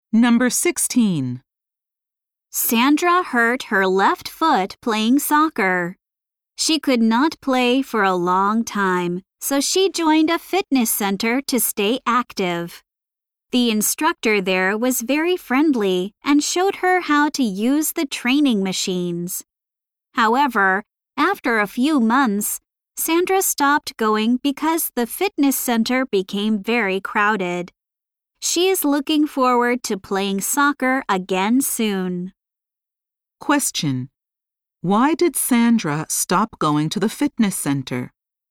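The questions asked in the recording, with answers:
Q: Why did Sandra stop going to the fitness center?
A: Because it became very crowded.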